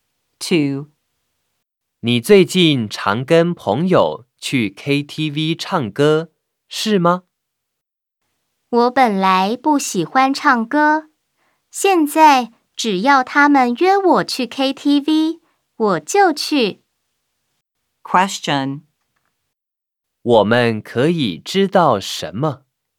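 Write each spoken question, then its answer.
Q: 我们可以知道什么?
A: 说话人本来不喜欢唱歌,现在只要朋友约就去KTV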